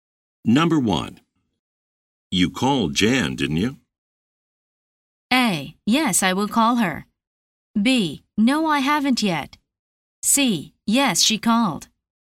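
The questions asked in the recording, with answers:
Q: You called Jan, didn't you?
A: B: No, I haven't yet.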